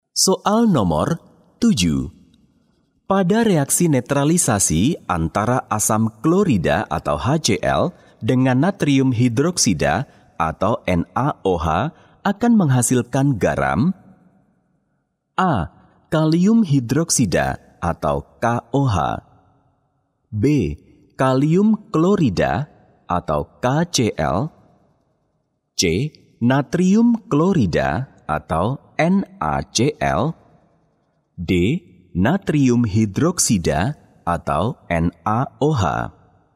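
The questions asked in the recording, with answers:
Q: Pada reaksi netralisasi antara asam klorida atau HCl dengan natrium hidroksida atau NaOH akan menghasilkan garam?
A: C: Natrium klorida atau NaCl.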